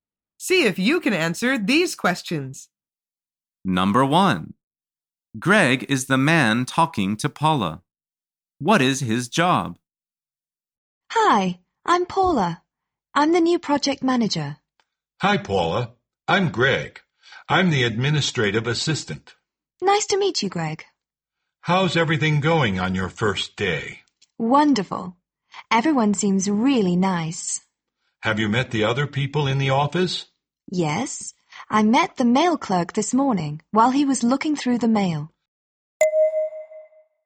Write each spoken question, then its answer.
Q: Greg is the man talking to Paula. What is his job?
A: The answer is he is the administrative assistant.